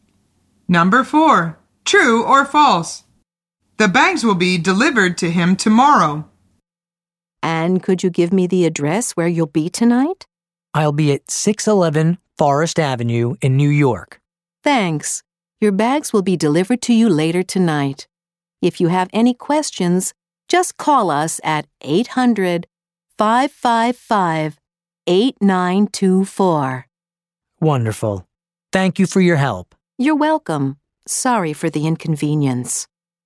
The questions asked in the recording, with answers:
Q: True or false? The bags will be delivered to him tomorrow.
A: The answer is false.